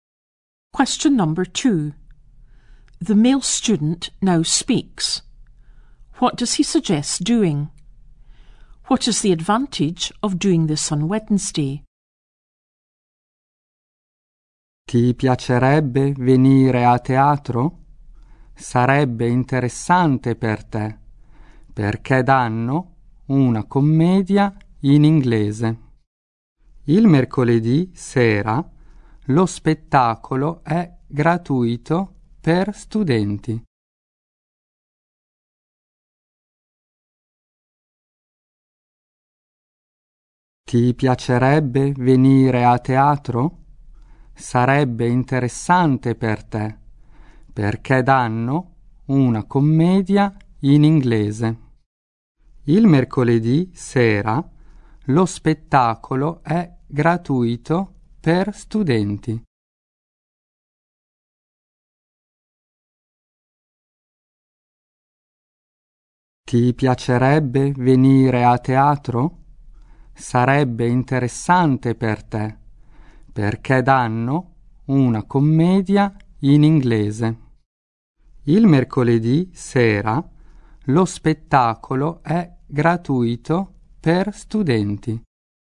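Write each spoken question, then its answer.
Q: What does he suggest doing?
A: Going to the theatre (a comedy in English)

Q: What is the advantage of doing this on Wednesday?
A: The show is free for students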